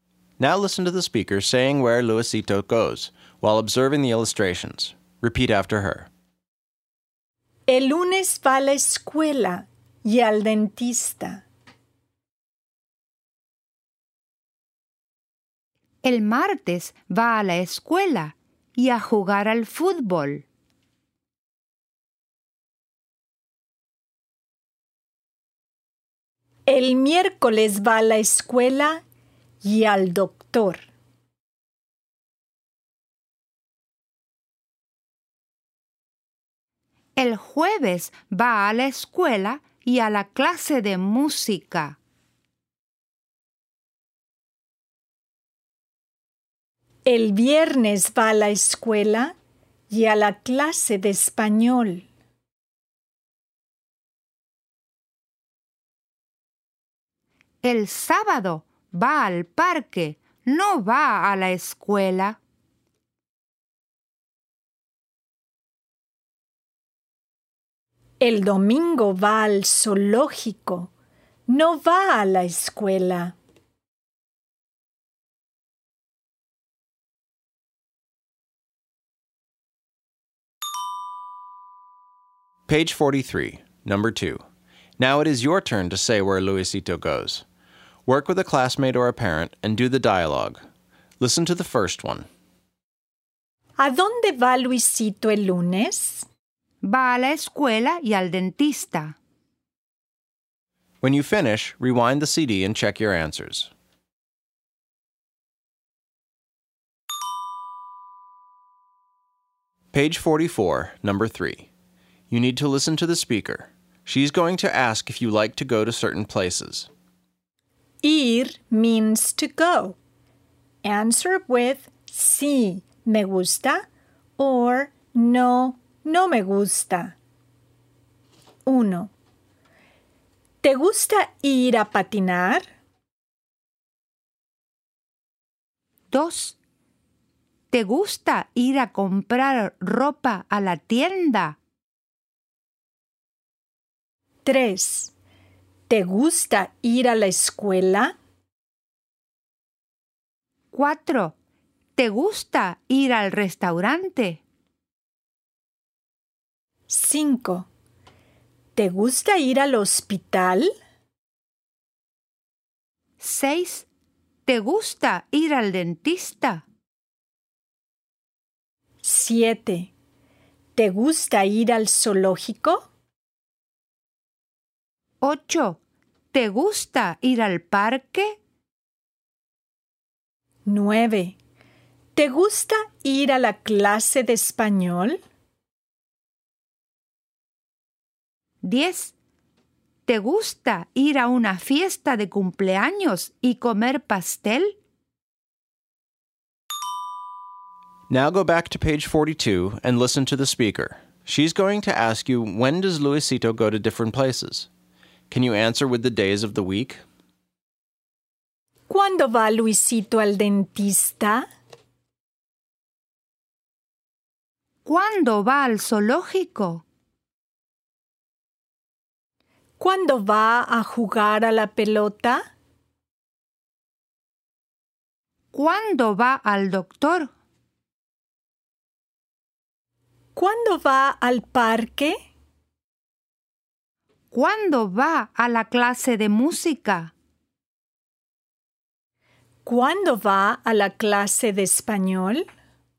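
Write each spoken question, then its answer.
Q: ¿Cuándo va Luisito al dentista?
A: El lunes

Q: ¿Cuándo va al zoológico?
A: El domingo

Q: ¿Cuándo va a jugar a la pelota?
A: El martes

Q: ¿Cuándo va al doctor?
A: El miércoles

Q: ¿Cuándo va al parque?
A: El sábado

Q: ¿Cuándo va a la clase de música?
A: El jueves

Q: ¿Cuándo va a la clase de español?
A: El viernes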